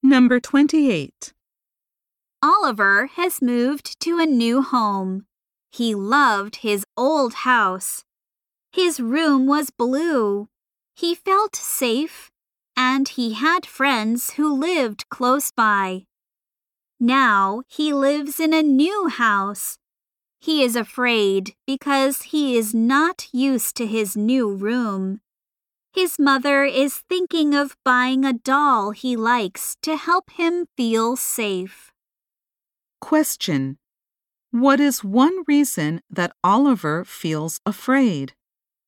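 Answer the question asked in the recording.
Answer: He is not used to his new room.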